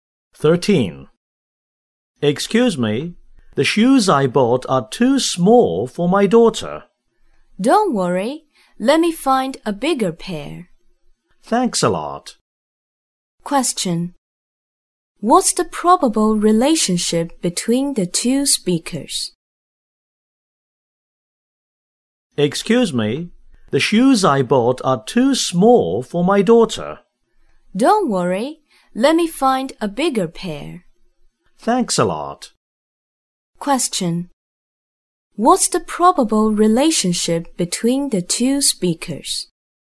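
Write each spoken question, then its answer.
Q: What's the probable relationship between the two speakers?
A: Customer and shop assistant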